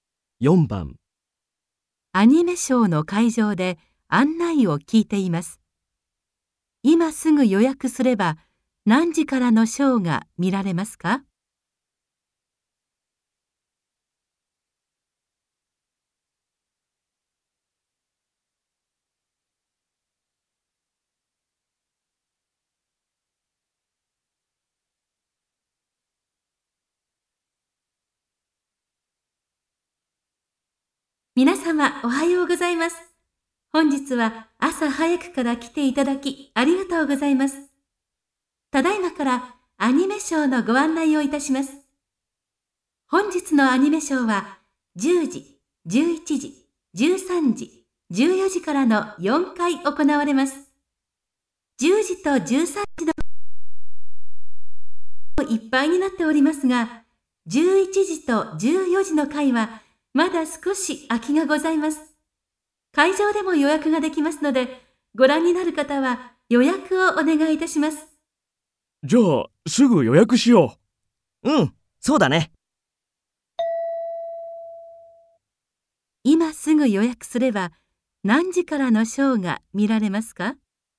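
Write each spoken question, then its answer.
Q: 今すぐ予約すれば、何時からのショーが見られますか?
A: 11時と14時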